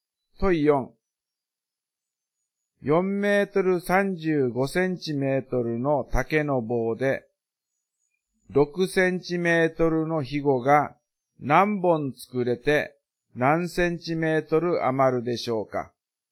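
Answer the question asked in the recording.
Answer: 72本作れて3センチメートル余る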